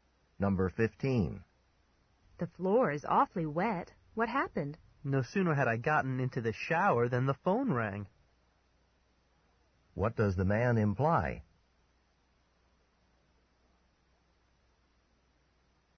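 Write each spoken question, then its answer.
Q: What does the man imply?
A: He got out of the shower wet to answer the phone.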